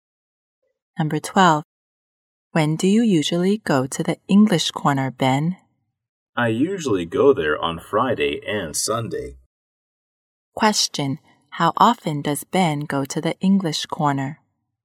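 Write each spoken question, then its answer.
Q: How often does Ben go to the English corner?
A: Twice a week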